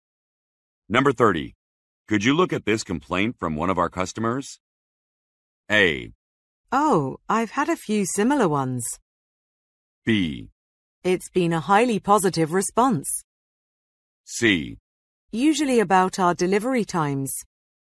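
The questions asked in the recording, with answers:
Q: Could you look at this complaint from one of our customers?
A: A: Oh, I've had a few similar ones.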